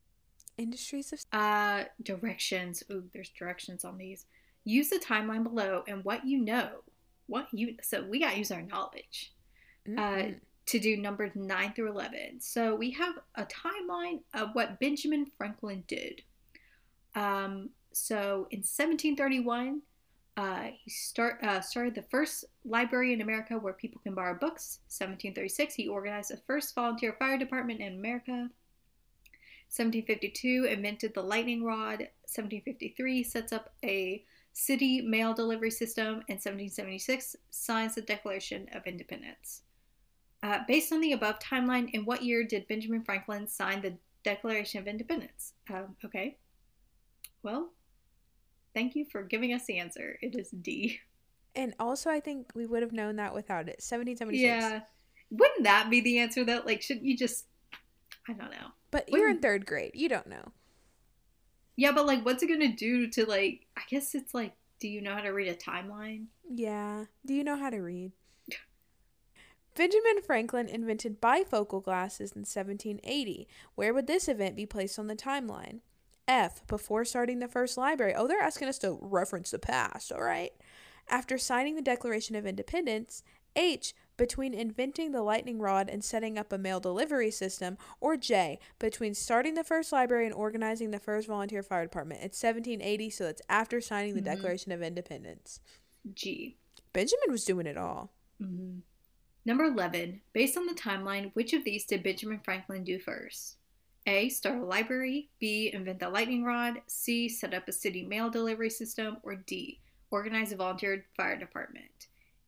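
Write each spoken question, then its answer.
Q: based on the above timeline, in what year did Benjamin Franklin sign the Declaration of Independence?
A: 1776

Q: Where would this event be placed on the timeline?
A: G: After signing the Declaration of Independence

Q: Based on the timeline, which of these did Benjamin Franklin do first?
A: It is start a library.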